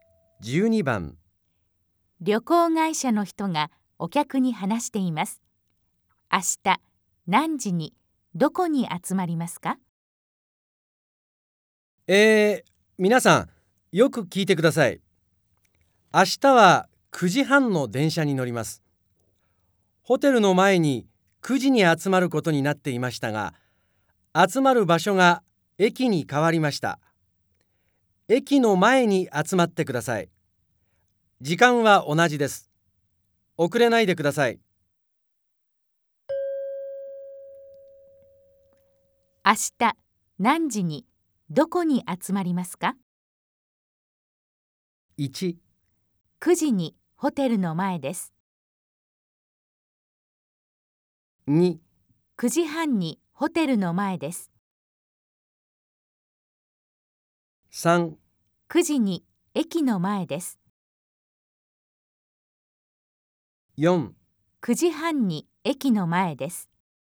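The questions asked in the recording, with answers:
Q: 明日何時にどこに集まりますか?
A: 3: 9時に駅の前です。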